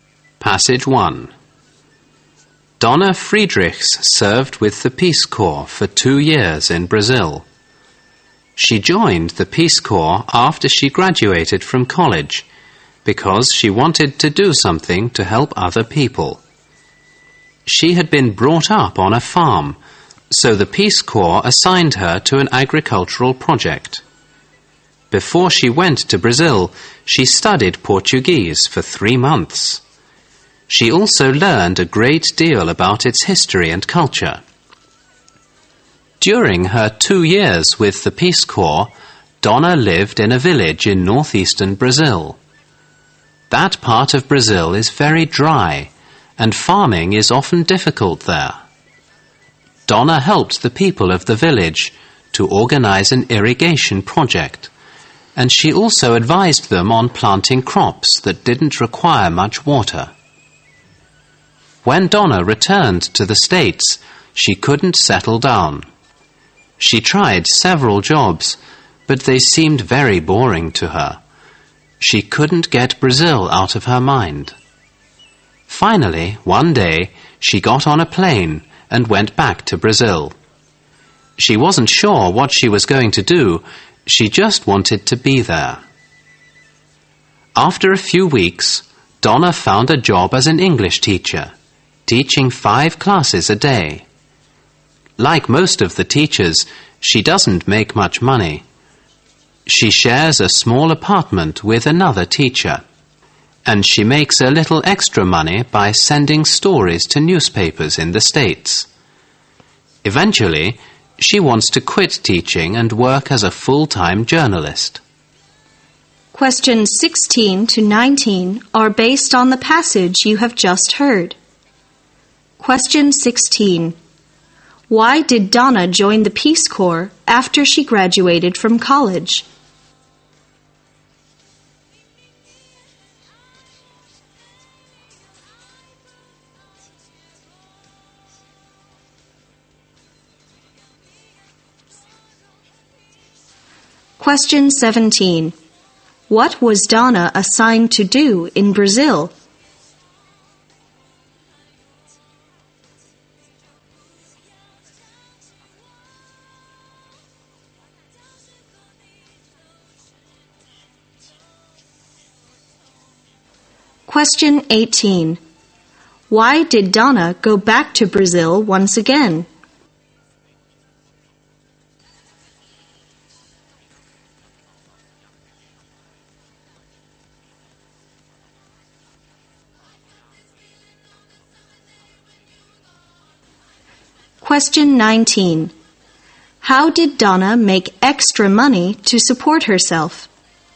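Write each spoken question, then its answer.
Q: Why did Donna join the Peace Corps after she graduated from college?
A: She wanted to help other people

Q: What was Donna assigned to do in Brazil?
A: Work on an agricultural project

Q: Why did Donna go back to Brazil once again?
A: She couldn't get Brazil out of her mind and found jobs at home boring

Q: How did Donna make extra money to support herself?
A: By sending stories to newspapers in the States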